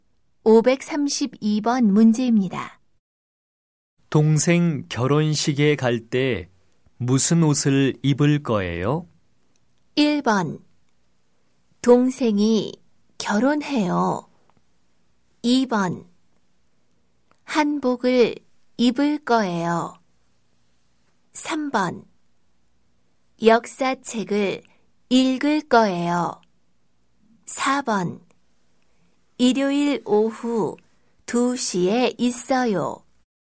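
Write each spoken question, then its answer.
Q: 동생 결혼식에 갈 때 무슨 옷을 입을 거예요?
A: 2: 한복을 입을 거예요.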